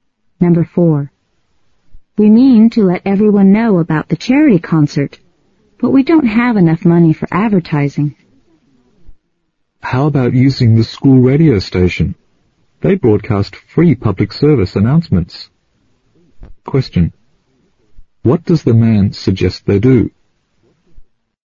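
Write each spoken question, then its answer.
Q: What does the man suggest they do?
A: Use the school radio station to announce the concert for free.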